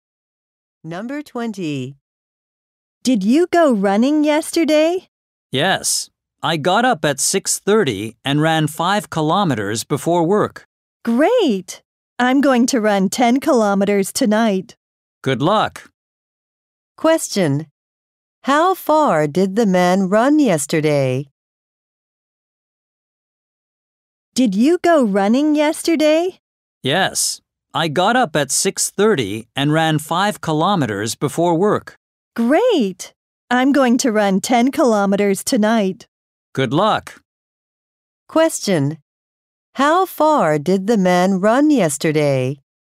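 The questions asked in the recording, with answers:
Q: How far did the man run yesterday?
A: 5 kilometers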